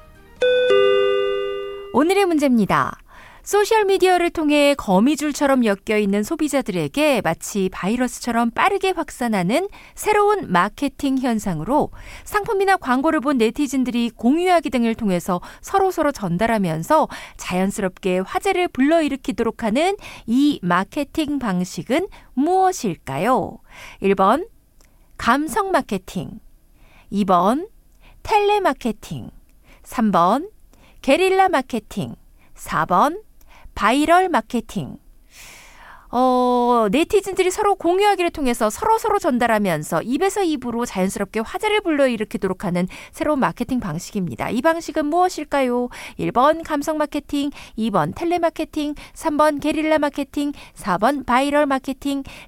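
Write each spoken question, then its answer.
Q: 소셜미디어를 통해 거미줄처럼 엮여있는 소비자들에게 마치 바이러스처럼 빠르게 확산하는 새로운 마케팅 현상으로 상품이나 광고를 본 네티즌들이 공유하기 등을 통해서 서로서로 전달하면서 자연스럽게 화제를 불러일으키도록 하는 이 마케팅 방식은 무엇일까요?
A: 4: 바이럴 마케팅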